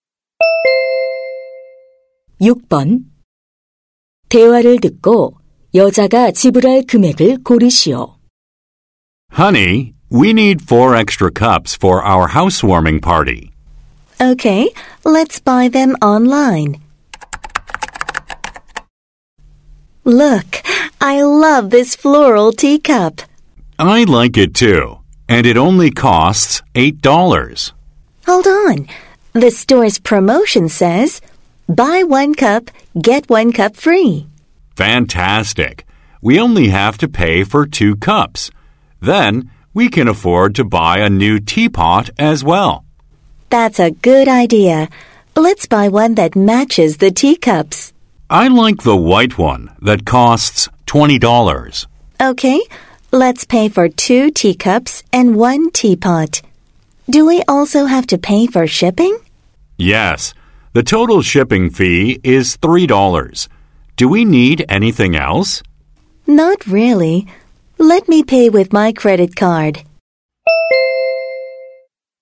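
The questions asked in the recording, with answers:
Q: 대화를 듣고 여자가 지불할 금액을 고르시오.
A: $39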